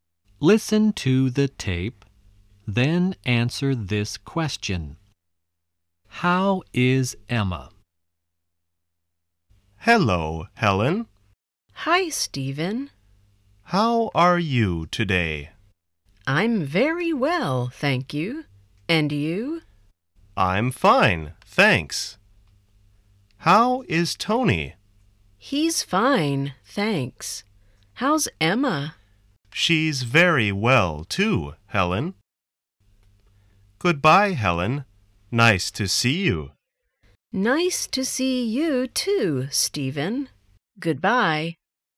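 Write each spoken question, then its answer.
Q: How is Emma?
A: She's very well.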